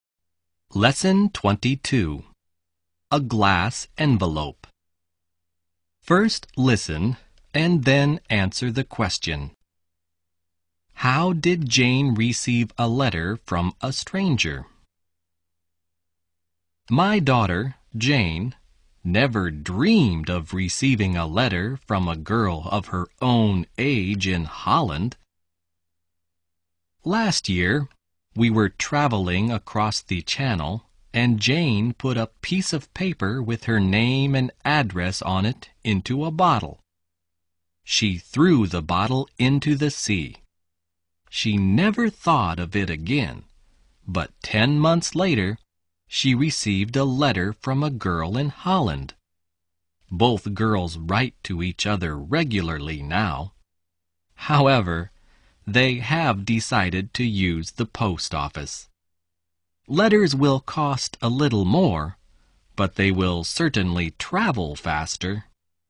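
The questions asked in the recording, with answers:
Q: How did Jane receive a letter from a stranger?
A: She put her name and address in a bottle and threw it into the sea; a girl in Holland found it and wrote to her.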